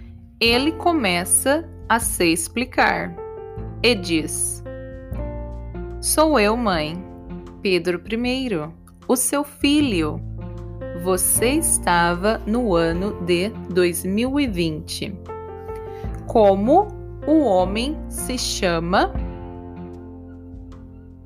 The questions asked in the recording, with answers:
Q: Como o homem se chama?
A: Pedro. O homem se chama Pedro.